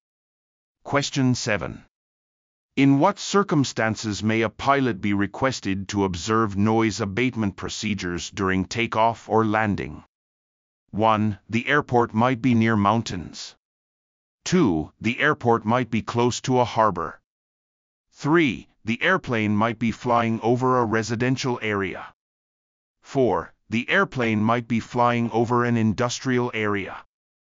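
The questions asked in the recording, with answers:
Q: In what circumstances may a pilot be requested to observe noise abatement procedures during takeoff or landing?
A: 3: The airplane might be flying over a residential area.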